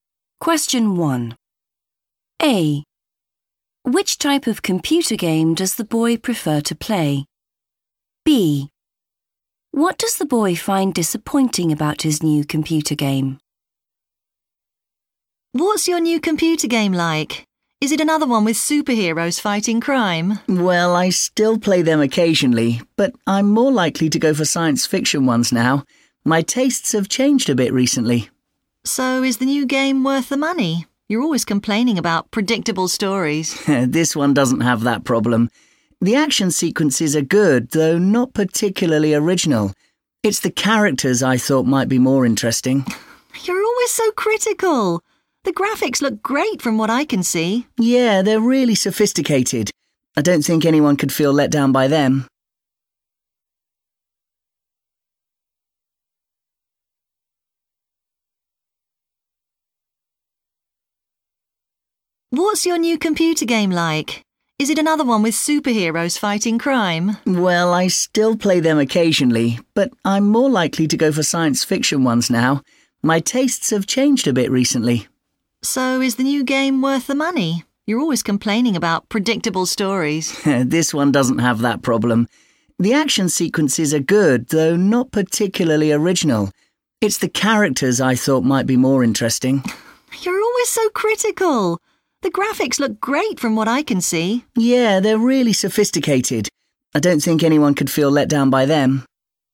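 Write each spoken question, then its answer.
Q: Which type of computer game does the boy prefer to play?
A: science fiction games

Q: What does the boy find disappointing about his new computer game?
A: the characters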